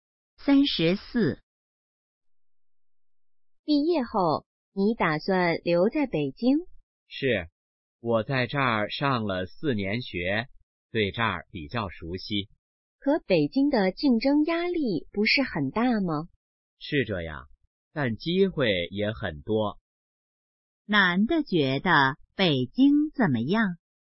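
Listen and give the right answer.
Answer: 竞争压力大,但机会多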